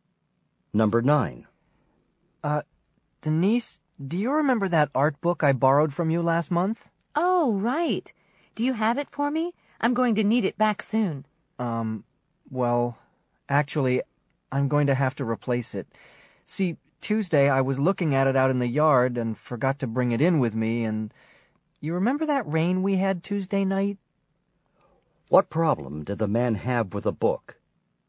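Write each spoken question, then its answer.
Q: What problem did the man have with the book?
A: He left it outside and it got ruined by rain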